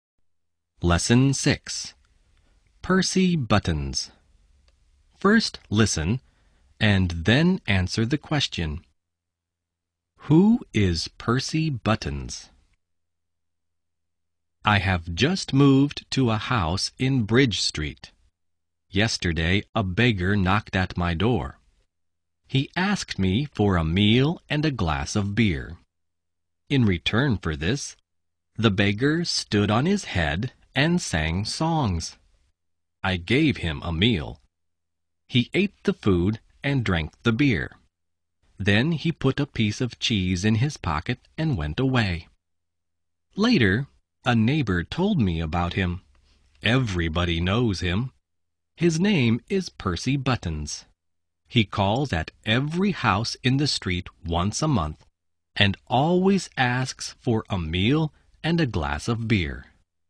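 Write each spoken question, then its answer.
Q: Who is Percy Buttons?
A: A beggar who calls at every house in the street once a month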